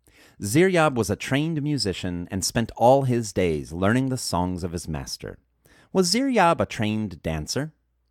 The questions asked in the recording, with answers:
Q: Was Ziryab a trained dancer?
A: No, Ziryab wasn't a trained dancer.